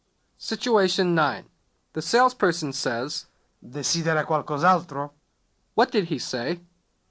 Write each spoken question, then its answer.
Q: What did he say?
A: Do you want anything else?